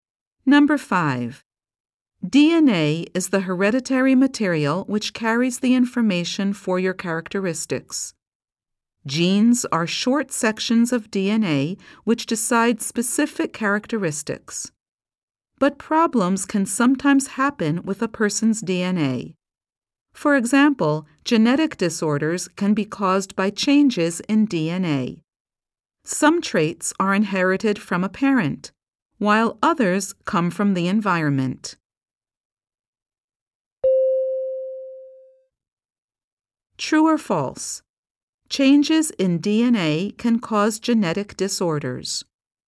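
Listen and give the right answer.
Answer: True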